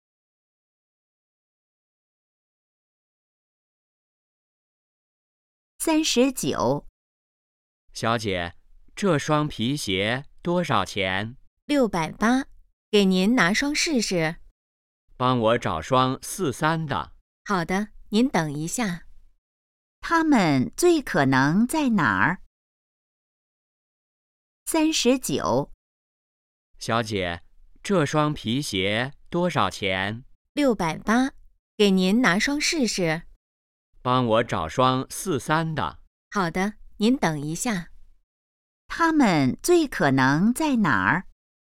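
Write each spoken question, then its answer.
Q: 他们最可能在哪儿?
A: 鞋店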